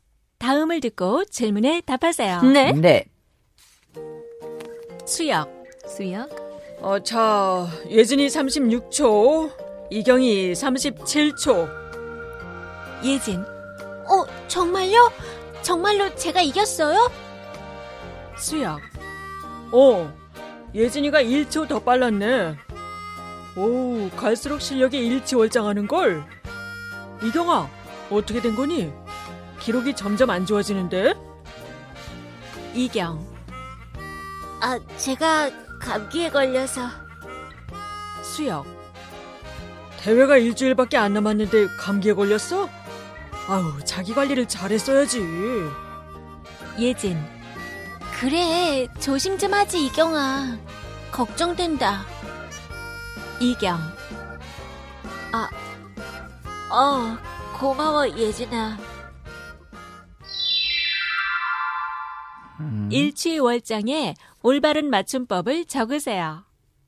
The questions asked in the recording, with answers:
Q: 일취월장에 올바른 맞춤법을 적으세요.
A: So il, chi, u, I, and then wol, chang.